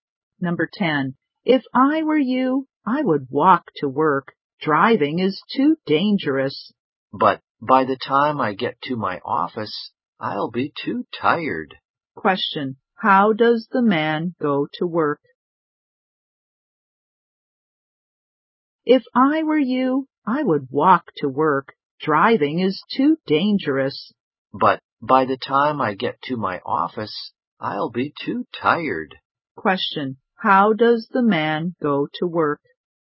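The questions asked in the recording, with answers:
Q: Question: How does the man go to work?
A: He drives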